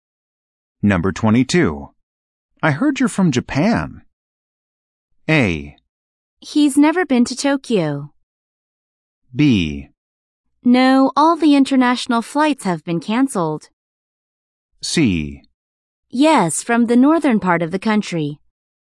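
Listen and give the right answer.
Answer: C: Yes, from the northern part of the country.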